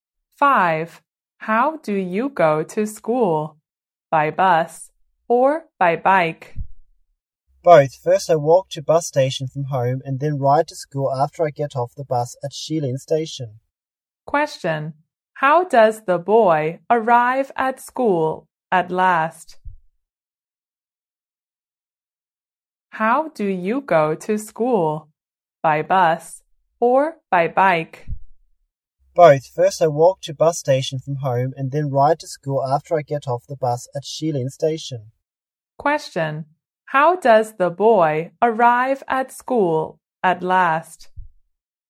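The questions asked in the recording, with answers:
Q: How does the boy arrive at school at last?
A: By bike.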